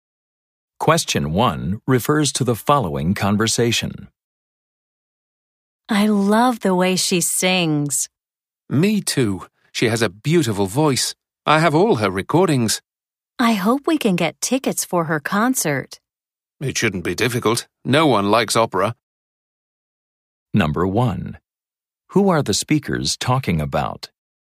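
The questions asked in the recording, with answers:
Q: Who are the speakers talking about?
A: An opera singer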